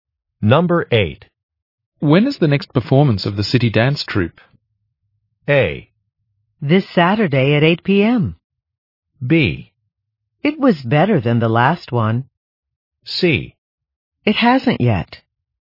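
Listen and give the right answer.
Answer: A: This Saturday at 8 p.m.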